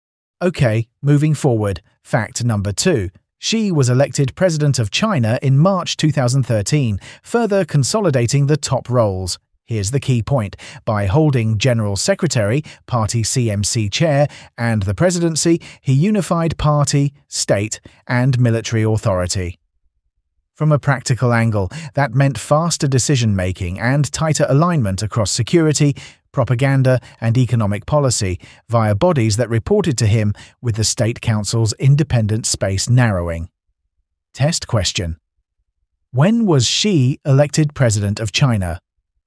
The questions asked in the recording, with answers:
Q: When was Xi elected President of China?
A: Correct answer, March 2013.